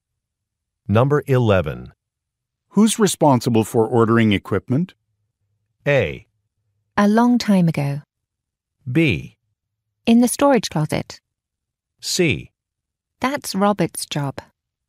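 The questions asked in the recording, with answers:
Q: Who's responsible for ordering equipment?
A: C: That's Robert's job.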